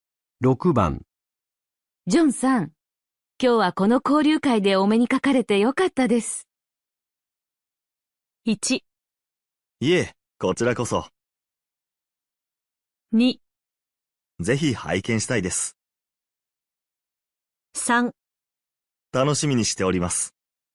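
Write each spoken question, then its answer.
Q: ジョンさん、今日はこの交流会でお目にかかれてよかったです。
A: 1: いえ、こちらこそ。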